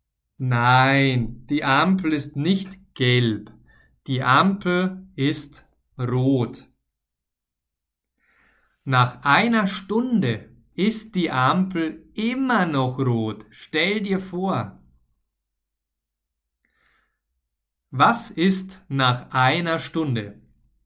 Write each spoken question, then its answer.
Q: Was ist nach einer Stunde?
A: Nach einer Stunde ist die Ampel immer noch rot.